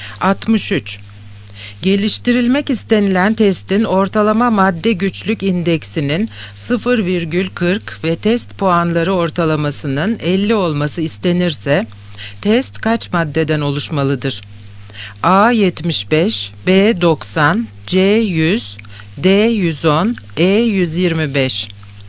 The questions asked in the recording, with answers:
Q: Geliştirilmek istenilen testin ortalama madde güçlük indeksinin 0,40 ve test puanları ortalamasının 50 olması istenirse test kaç maddeden oluşmalıdır?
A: Yanıt E 125.